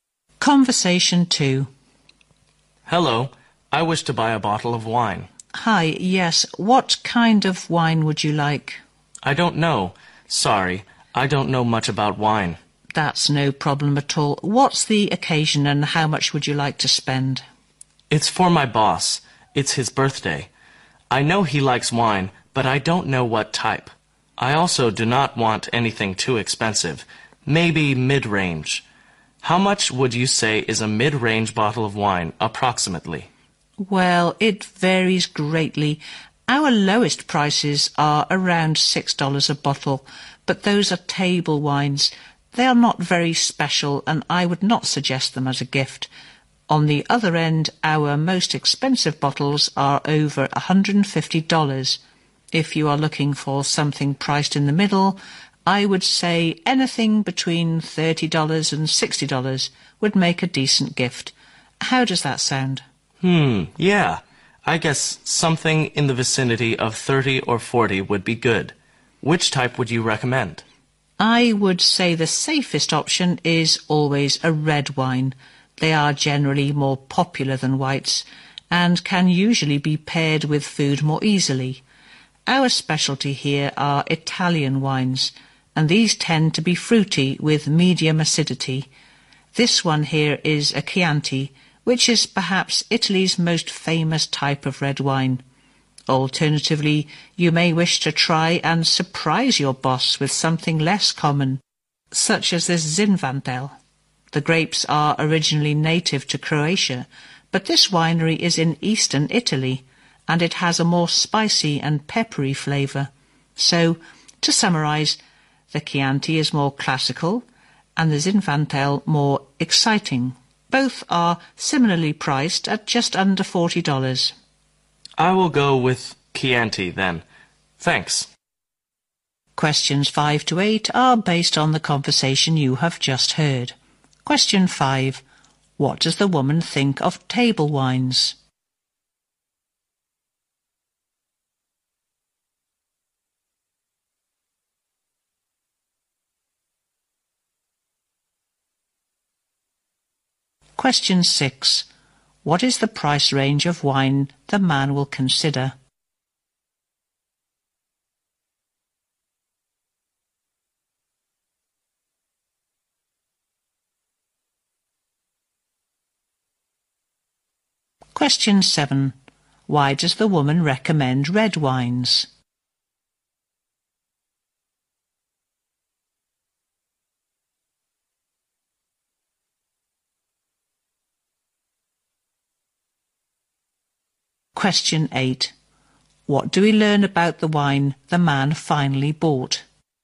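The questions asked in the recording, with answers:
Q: What does the woman think of table wines?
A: They are not special enough to give as a gift

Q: What is the price range of wine the man will consider?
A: About $30 to $40

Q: Why does the woman recommend red wines?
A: They are more popular and go with food more easily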